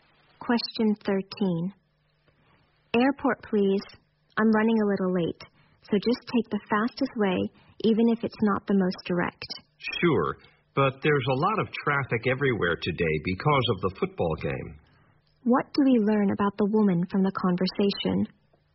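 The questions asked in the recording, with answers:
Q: What do we learn about the woman from the conversation?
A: She is running late and in a hurry to get to the airport.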